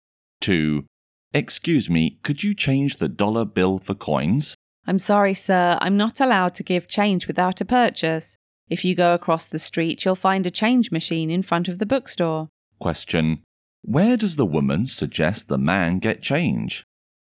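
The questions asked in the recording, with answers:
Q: Where does the woman suggest the man get change?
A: From a change machine in front of the bookstore across the street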